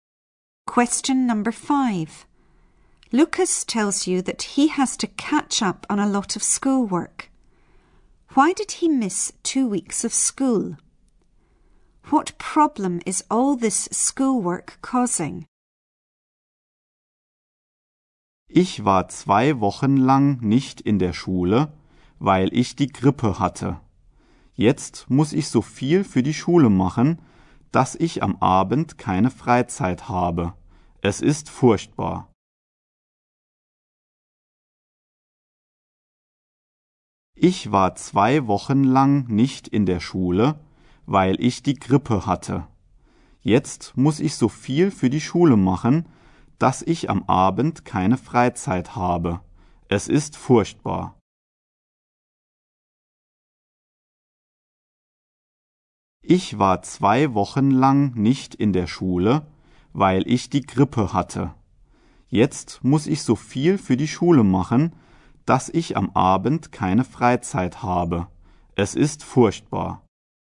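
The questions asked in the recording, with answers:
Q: Why did he miss 2 weeks of school?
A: He had flu

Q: What problem is all this schoolwork causing?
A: He has no free time in the evening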